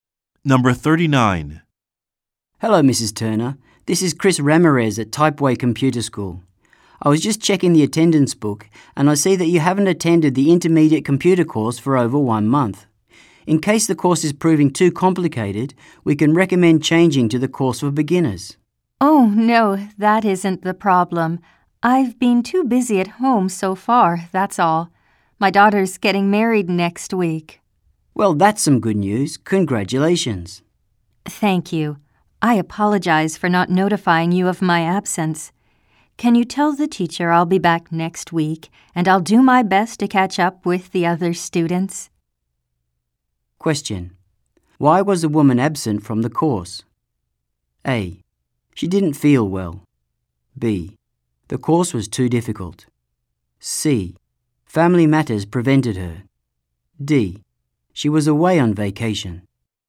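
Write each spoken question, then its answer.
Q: Why was the woman absent from the course?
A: C: Family matters prevented her.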